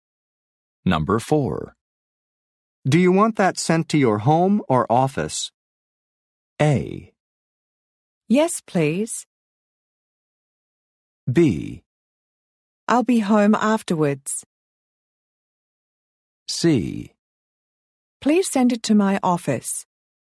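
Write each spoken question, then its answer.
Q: Do you want that sent to your home or office?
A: C: Please send it to my office.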